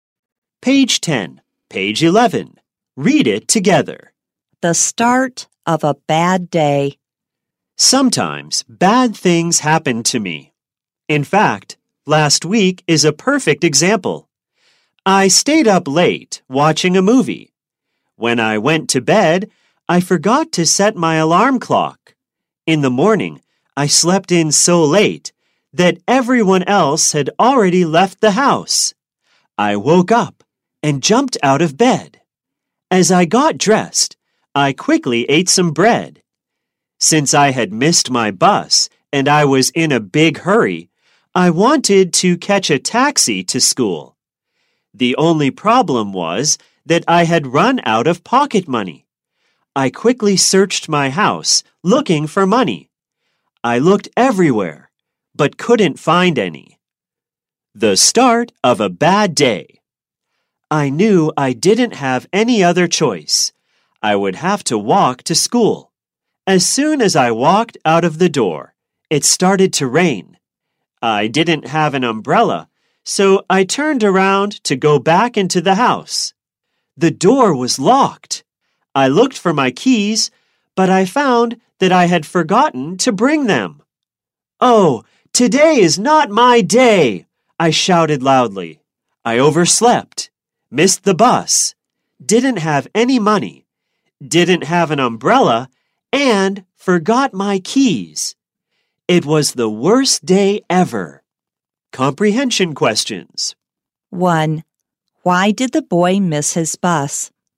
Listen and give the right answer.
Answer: He overslept, so he missed his bus.